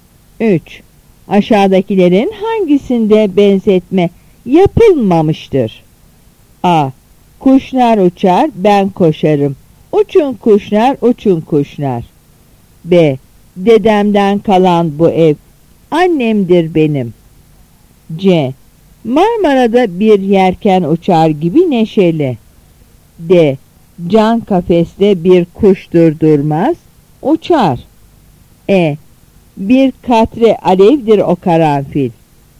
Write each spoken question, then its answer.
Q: Aşağıdakilerin hangisinde benzetme yapılmamıştır?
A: Yanıt A.